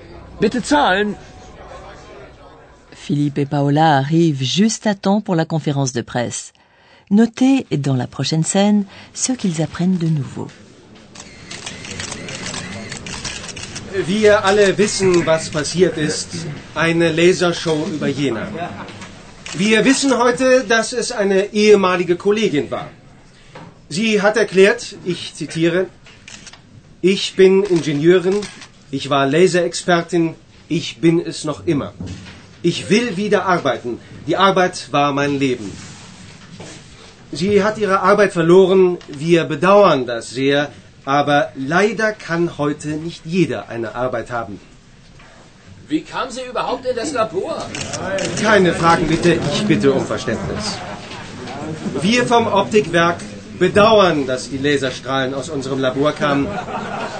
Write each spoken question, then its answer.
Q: Notez dans la prochaine scène ce qu'ils apprennent de nouveau.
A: Le show au laser, comme l'appelle ainsi le porte-parole de l'usine, est l'œuvre d'une ancienne collègue.